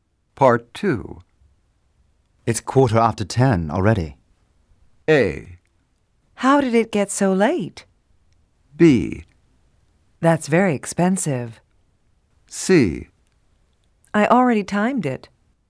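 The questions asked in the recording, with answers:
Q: It's 10:15 already.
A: A: How did it get so late?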